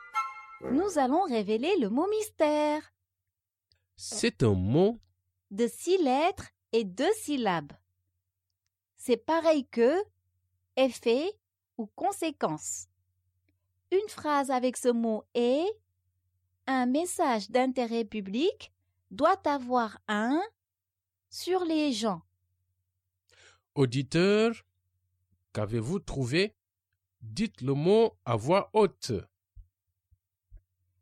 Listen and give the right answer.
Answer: Le mot mystère est impact.